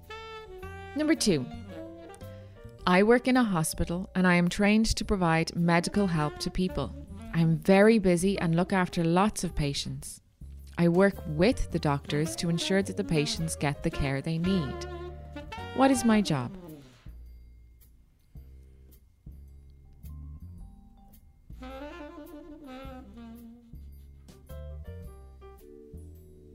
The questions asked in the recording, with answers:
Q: What is my job?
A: I'm a nurse.